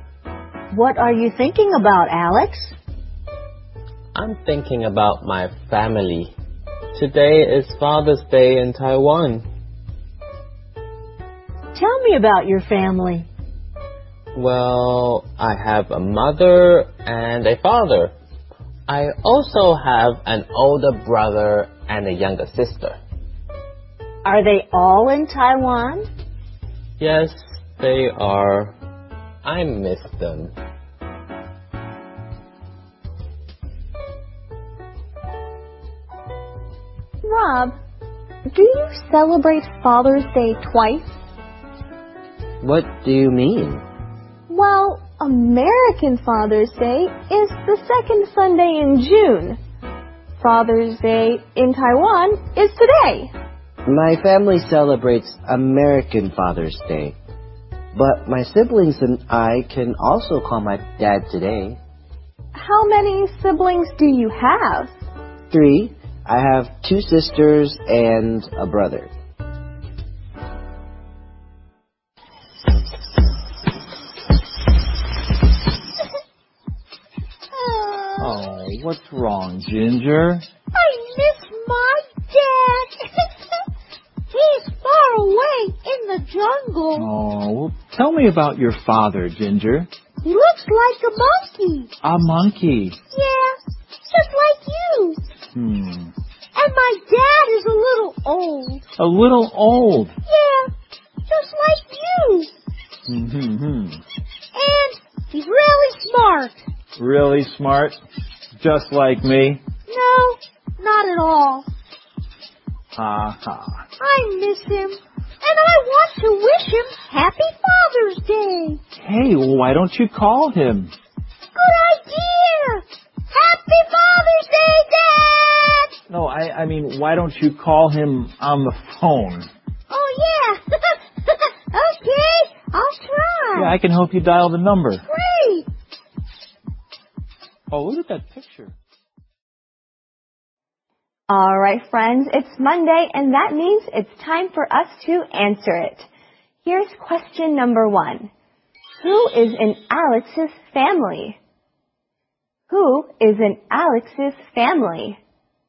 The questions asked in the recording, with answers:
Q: Who is in Alex's family? Who is in Alex's family?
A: Alex has a father, mother, an older brother, and a younger sister.